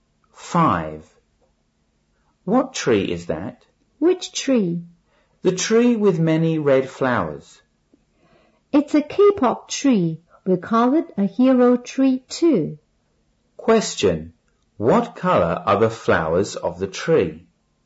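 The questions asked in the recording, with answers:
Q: What colour are the flowers of the tree?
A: Red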